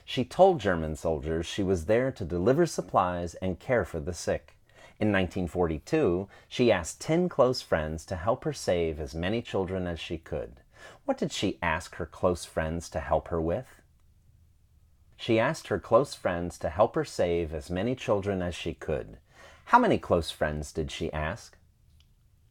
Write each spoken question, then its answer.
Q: How many close friends did she ask?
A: She asked 10 close friends.